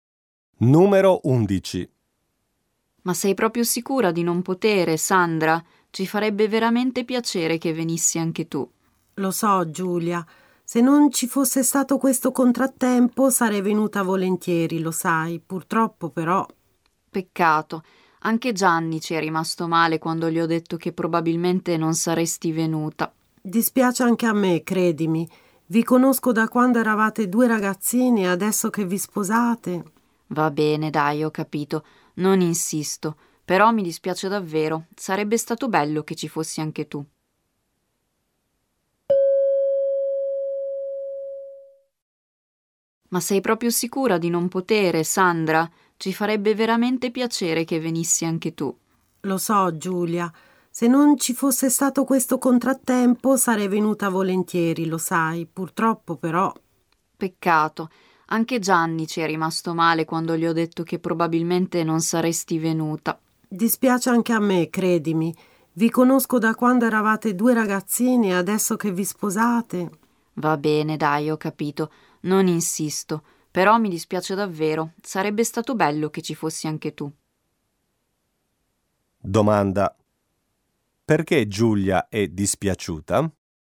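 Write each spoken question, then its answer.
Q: perché Giulia è dispiaciuta?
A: Perché Sandra non potrà venire al suo matrimonio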